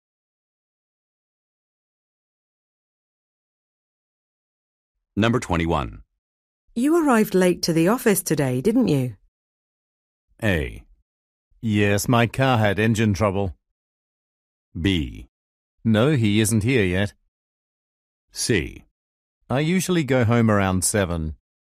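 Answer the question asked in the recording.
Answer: A: Yes, my car had engine trouble.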